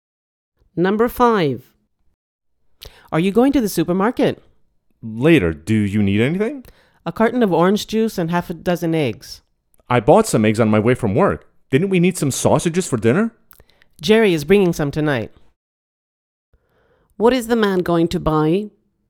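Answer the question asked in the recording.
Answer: A carton of orange juice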